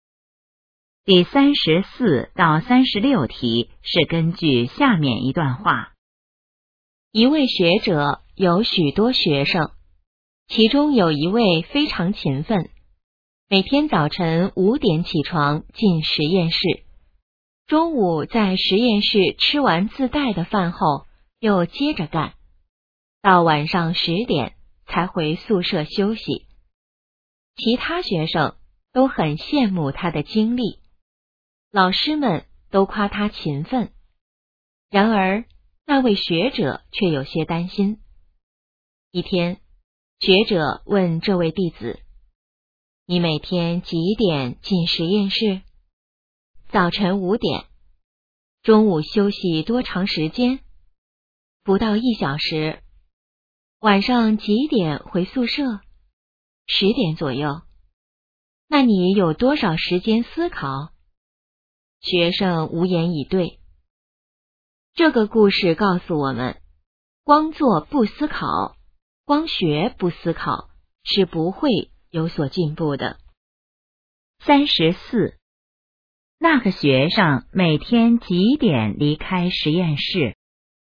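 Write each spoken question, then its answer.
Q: 那个学生每天几点离开实验室?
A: 晚上十点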